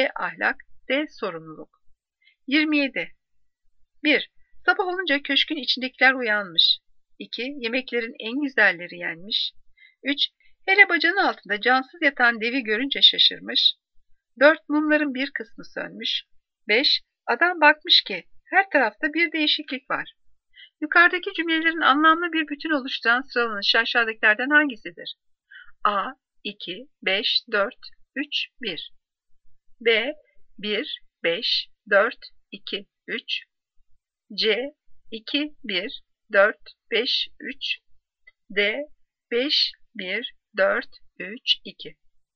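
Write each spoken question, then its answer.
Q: Yukarıdaki cümlelerin anlamlı bir bütün oluşturan sıralanışı aşağıdakilerden hangisidir?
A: B: 1, 5, 4, 2, 3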